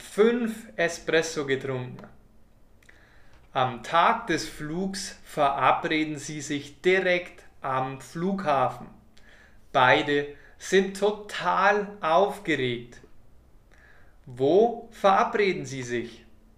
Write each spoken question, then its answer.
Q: Wo verabreden Sie sich?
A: Am Flughafen. Sie verabreden sich am Flughafen.